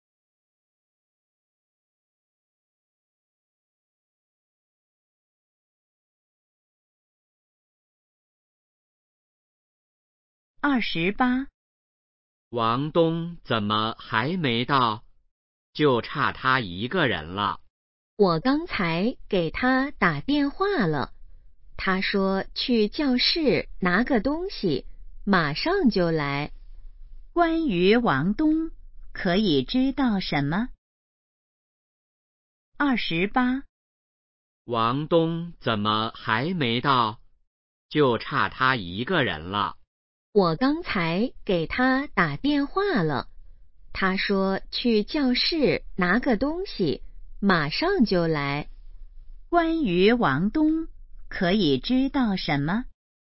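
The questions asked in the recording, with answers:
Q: 关于王东,可以知道什么?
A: 他去教室拿东西了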